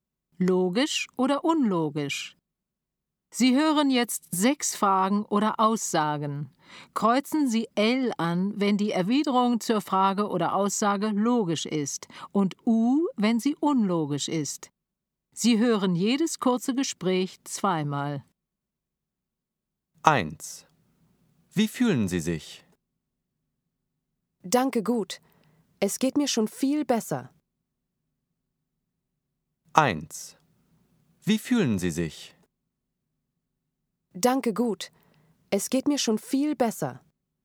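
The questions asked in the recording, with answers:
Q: Wie fühlen Sie sich? Danke, gut. Es geht mir schon viel besser.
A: L: logisch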